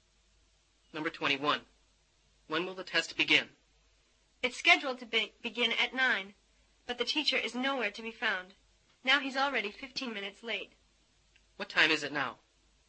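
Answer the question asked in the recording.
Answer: 9:15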